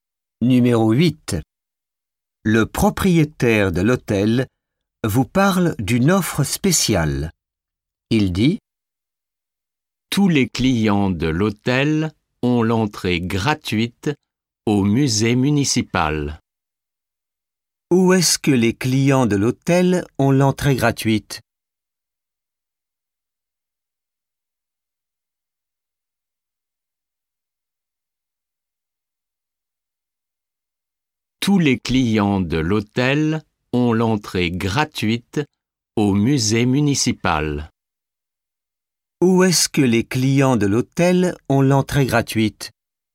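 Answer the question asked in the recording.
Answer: Au musée municipal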